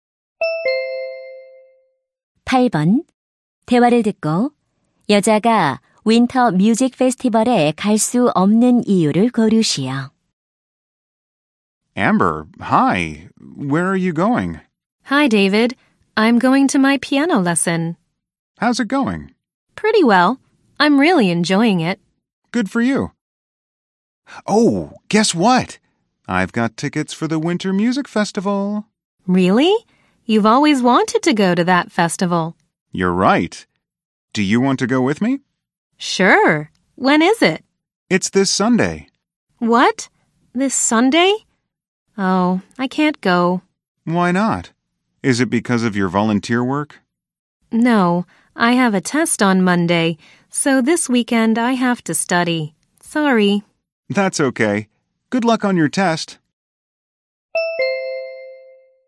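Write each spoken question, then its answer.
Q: 대화를 듣고 여자가 윈터 뮤직 페스티벌에 갈 수 없는 이유를 고르시오.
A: 월요일 시험 공부를 해야 해서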